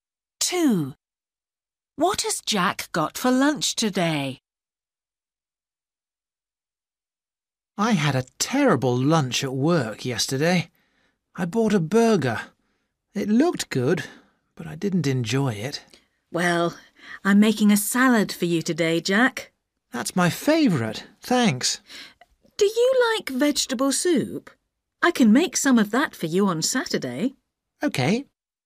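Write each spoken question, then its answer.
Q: What has Jack got for lunch today?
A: A salad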